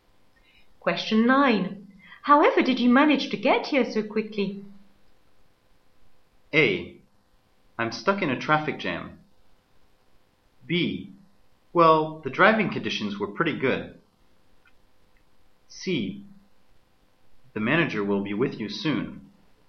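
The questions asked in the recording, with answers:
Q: However did you manage to get here so quickly?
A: B: Well, the driving conditions were pretty good.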